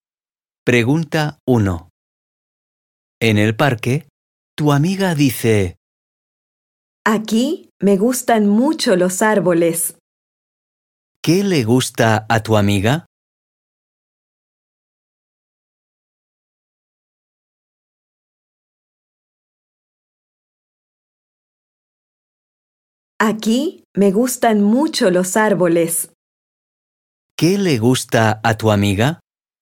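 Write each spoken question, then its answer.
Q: ¿Qué le gusta a tu amiga?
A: los árboles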